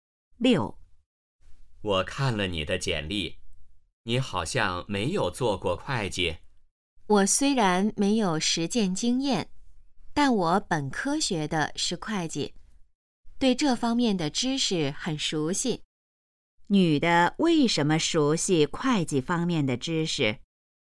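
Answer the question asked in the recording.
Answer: 她本科学的是会计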